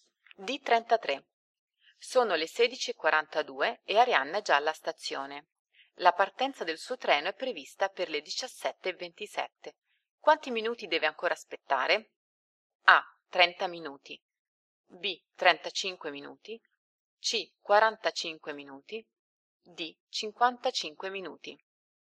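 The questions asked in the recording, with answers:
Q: Quanti minuti deve ancora aspettare?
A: C: 45 minuti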